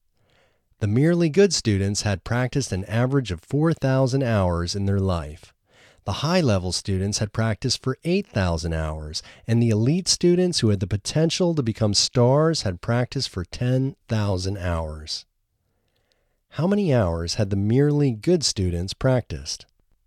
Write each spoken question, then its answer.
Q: How many hours had the merely good students practiced?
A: The merely good students practiced 4,000 hours in their life.